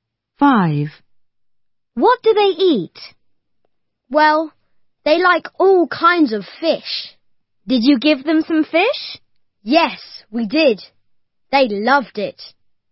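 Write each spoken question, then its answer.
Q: What do they eat?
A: fish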